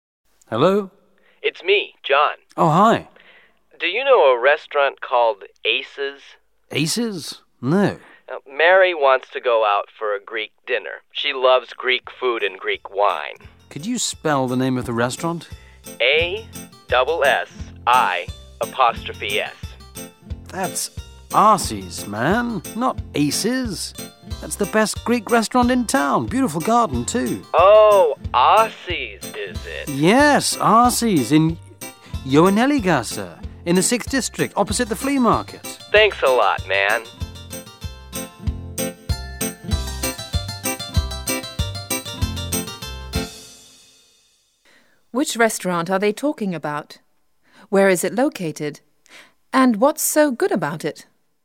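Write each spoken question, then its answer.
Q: Where is it located?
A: In the 6th District, opposite the flea market

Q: And what's so good about it?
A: It's the best Greek restaurant in town and has a beautiful garden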